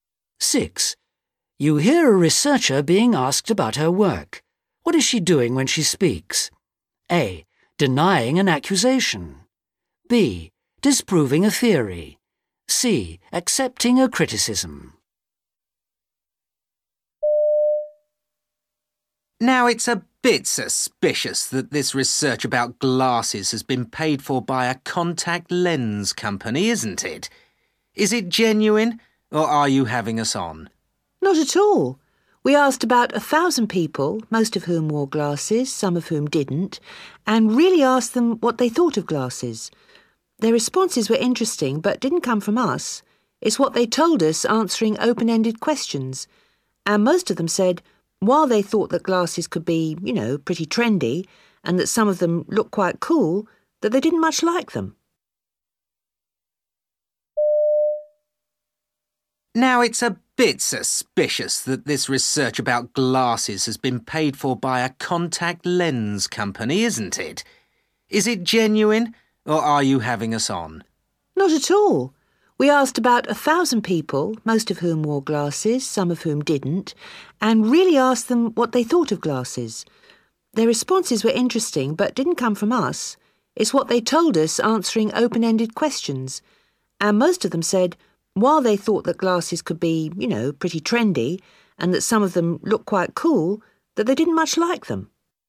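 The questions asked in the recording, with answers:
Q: What is she doing when she speaks?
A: A: Denying an accusation.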